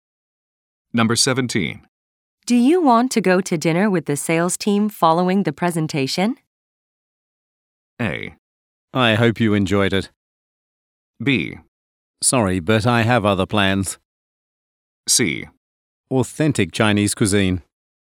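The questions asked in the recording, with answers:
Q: Do you want to go to dinner with the sales team following the presentation?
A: B: Sorry, but I have other plans.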